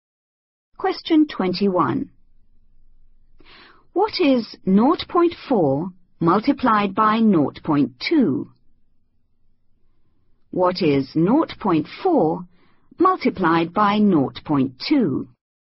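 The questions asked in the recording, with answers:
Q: What is 0.4 multiplied by 0.2?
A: 0.08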